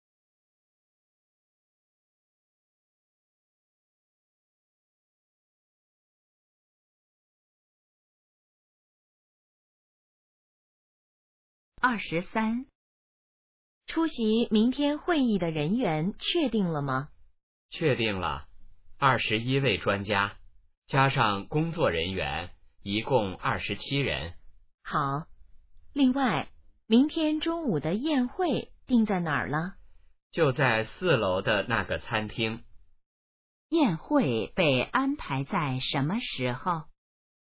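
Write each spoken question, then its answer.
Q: 宴会被安排在什么时候?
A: 明天中午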